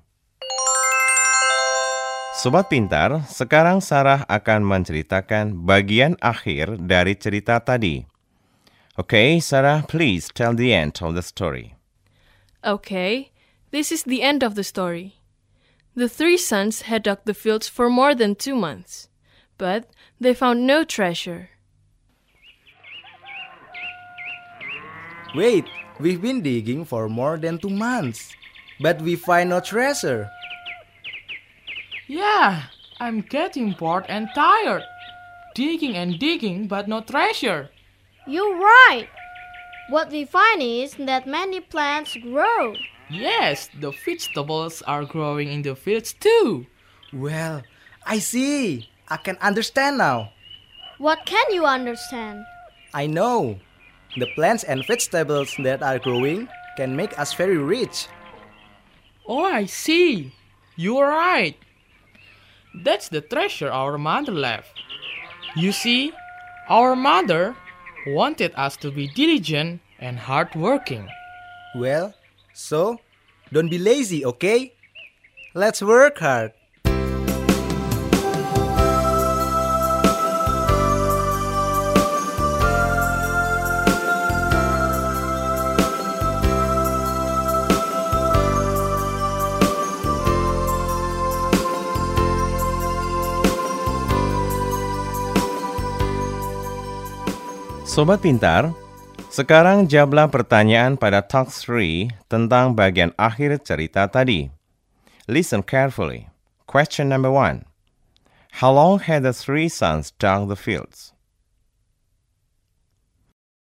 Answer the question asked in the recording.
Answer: More than 2 months. Right.